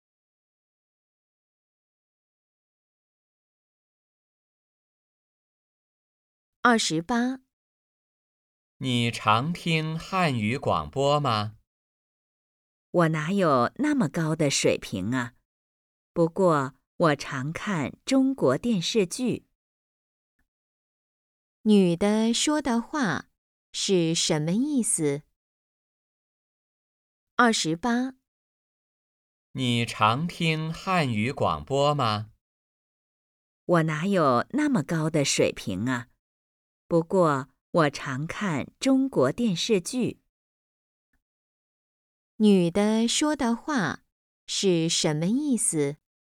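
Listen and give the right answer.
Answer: 她汉语水平不高,不常听汉语广播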